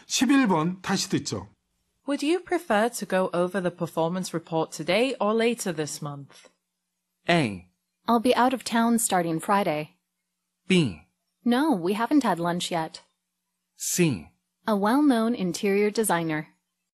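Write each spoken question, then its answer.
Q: Would you prefer to go over the performance report today or later this month?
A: A: I'll be out of town starting Friday.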